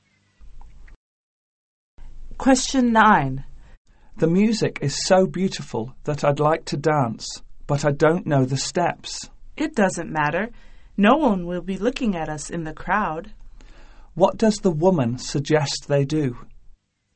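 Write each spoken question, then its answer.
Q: What does the woman suggest they do?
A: Dance anyway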